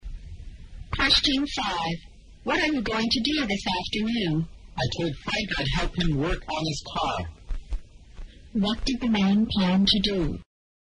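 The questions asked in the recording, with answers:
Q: What did the man plan to do?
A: Help Frank work on his car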